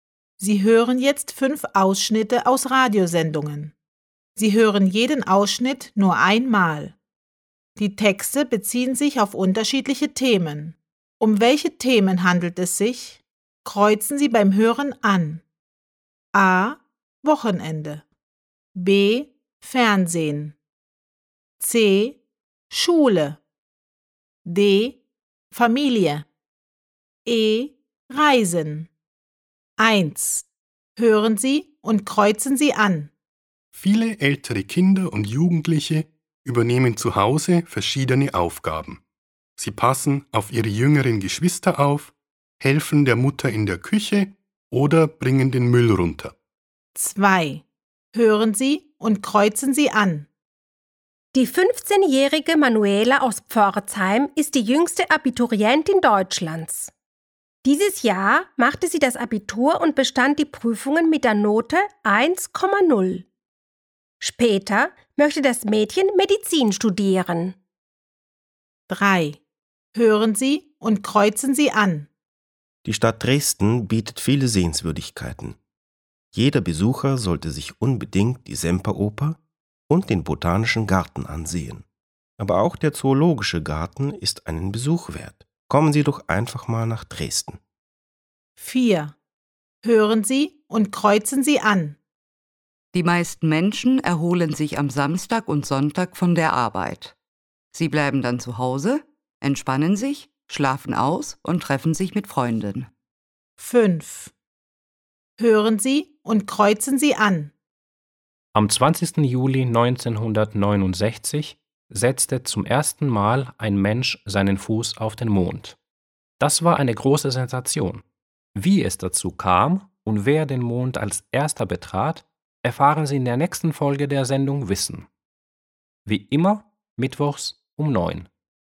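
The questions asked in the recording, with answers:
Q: Um welche Themen handelt es sich?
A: D: Familie

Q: Um welche Themen handelt es sich?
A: C: Schule

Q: Um welche Themen handelt es sich?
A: E: Reisen

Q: Um welche Themen handelt es sich?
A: A: Wochenende

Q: Um welche Themen handelt es sich?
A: B: Fernsehen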